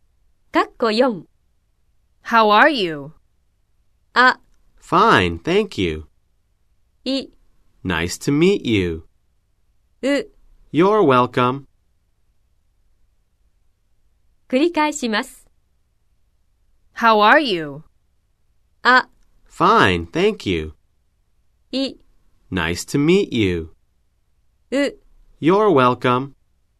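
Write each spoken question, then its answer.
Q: How are you?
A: あ: Fine, thank you.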